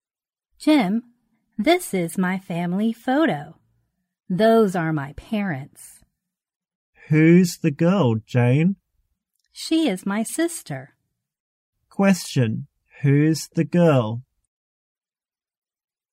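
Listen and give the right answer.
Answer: Jane's sister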